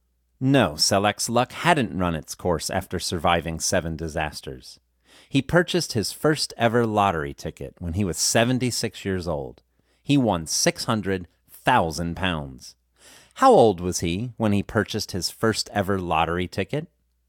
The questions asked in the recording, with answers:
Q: How old was he when he purchased his first ever lottery ticket?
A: He was 76 years old when he purchased his first ever lottery ticket.